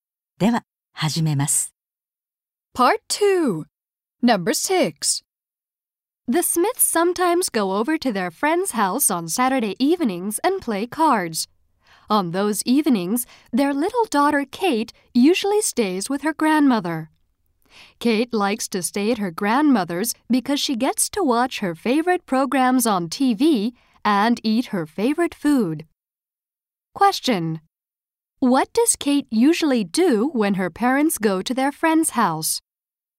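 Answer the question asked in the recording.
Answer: She stays with her grandmother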